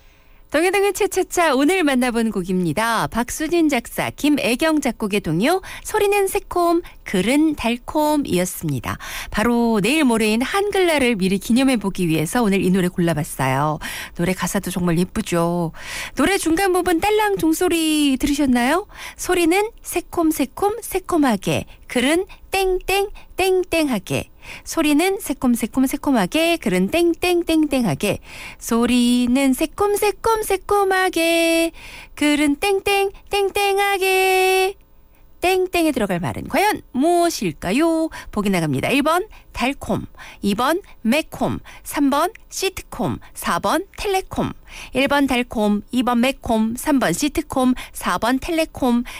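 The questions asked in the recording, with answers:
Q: 땡땡에 들어갈 말은 과연 무엇일까요?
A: 1: 달콤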